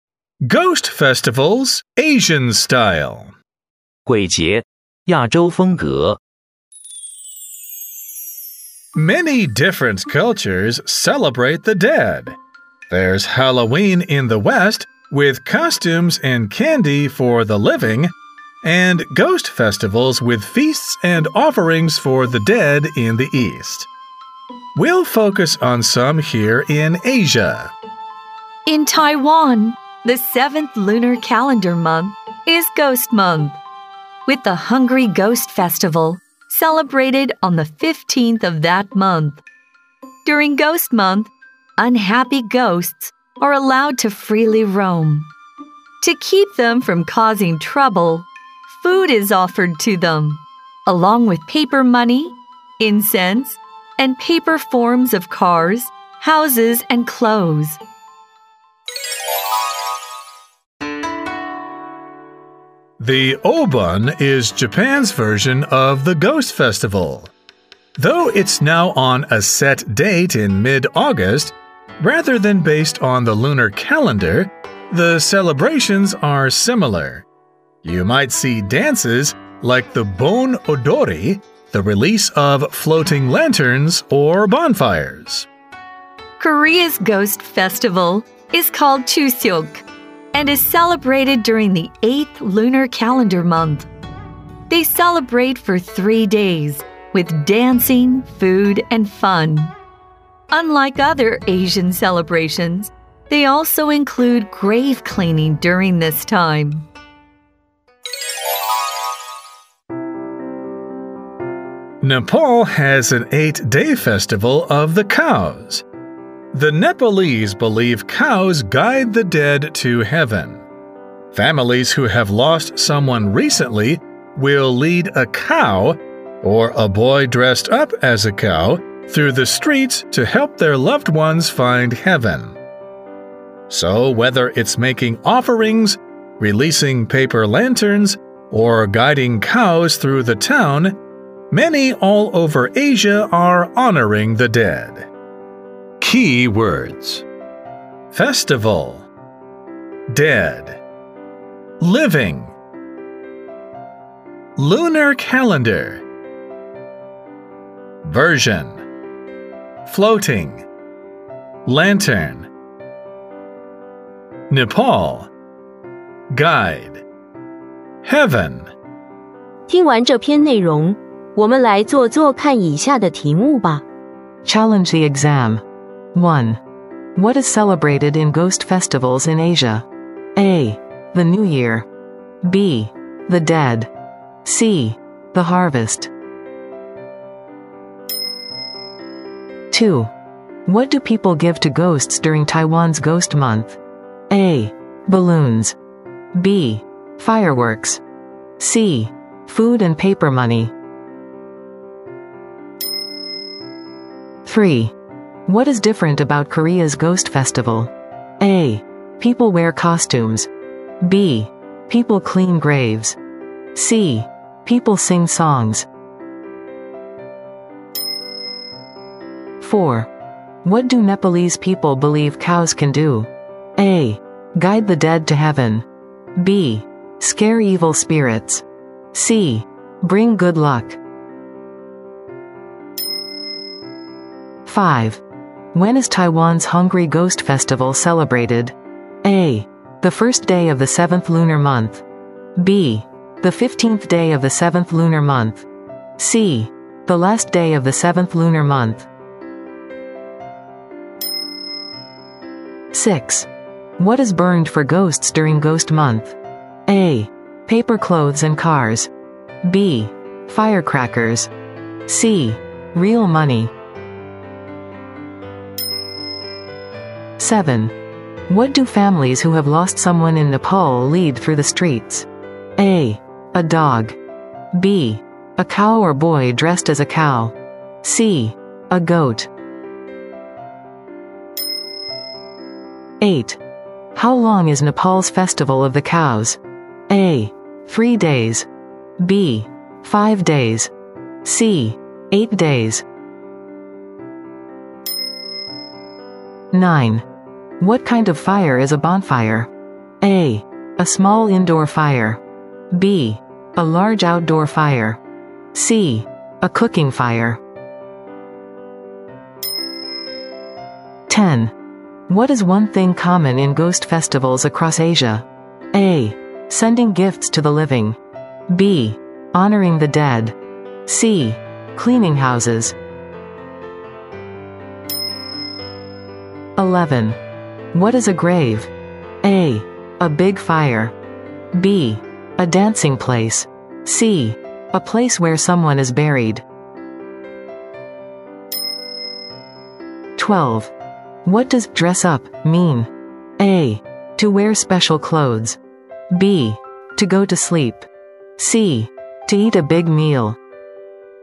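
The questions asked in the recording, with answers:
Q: What is celebrated in ghost festivals in Asia?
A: B: The Dead.

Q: What do people give to ghosts during Taiwan's Ghost Month?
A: C: Food and paper money.

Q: What is different about Korea's Ghost Festival?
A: B: People clean graves.

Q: What do Nepalese people believe cows can do?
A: A: Guide the dead to heaven.

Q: When is Taiwan's Hungry Ghost Festival celebrated?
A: B: The 15th day of the 7th lunar month.

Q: What do families who have lost someone in Nepal lead through the streets?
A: B: A cow or boy dressed as a cow.

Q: How long is Nepal's festival of the cows?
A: C: 8 days.

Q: What is one thing common in ghost festivals across Asia?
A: B: Honoring the dead.

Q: What does dress up mean?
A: A: To wear special clothes.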